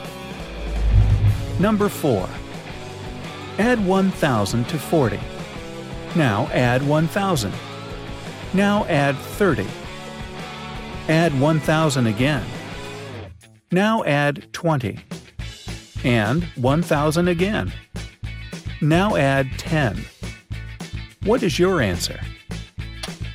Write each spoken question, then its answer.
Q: What is your answer?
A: The right answer is 4,100.